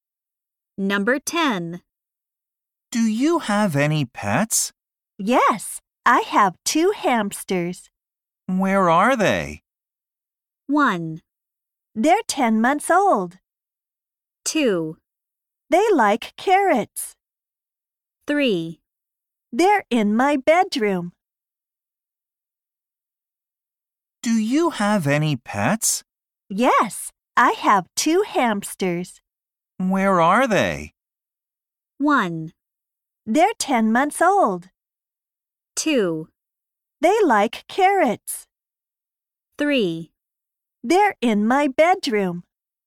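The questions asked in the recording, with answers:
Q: Where are they?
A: 3: They're in my bedroom.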